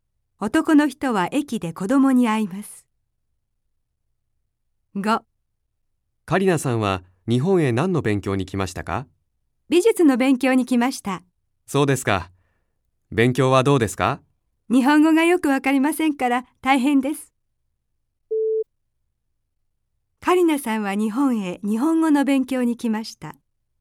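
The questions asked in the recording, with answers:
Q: カリナさんは日本へ日本語の勉強に来ました。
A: ×(美術の勉強)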